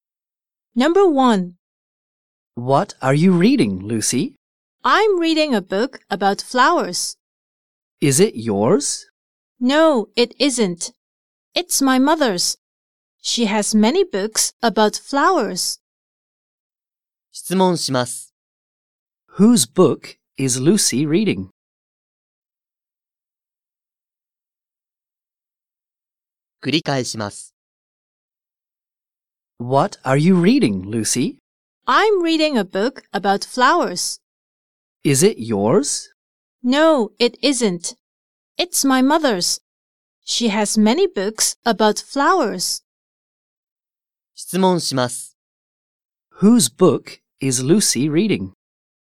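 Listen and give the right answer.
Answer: Her mother's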